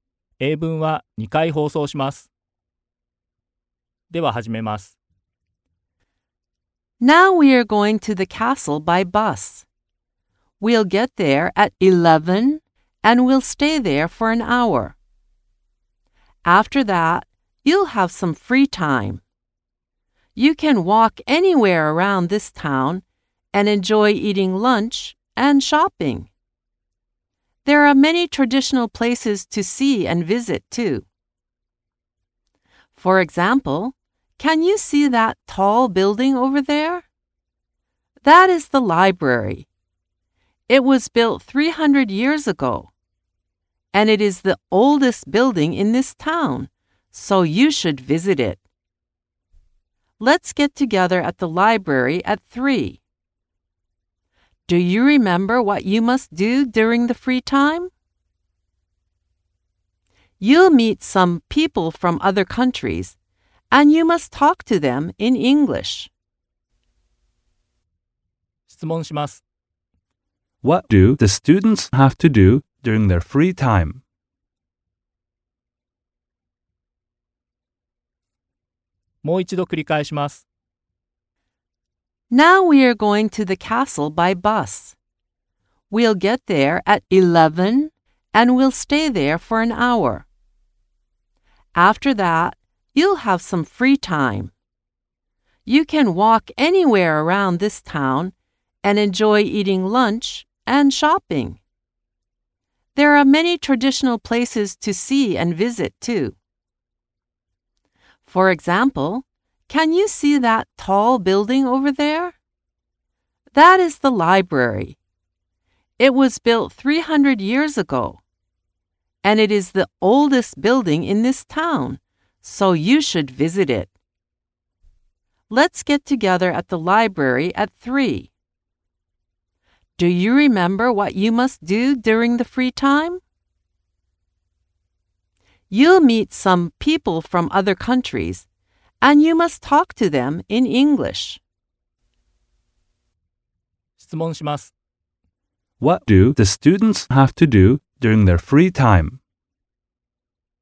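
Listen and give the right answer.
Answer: They have to talk to people from other countries in English.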